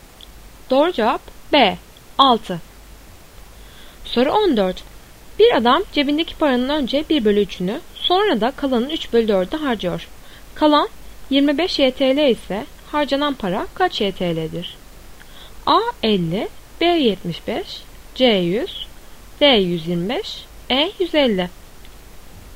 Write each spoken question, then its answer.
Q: Kalan 25 YTL ise harcanan para kaç YTL'dir?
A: Doğru cevap D 125.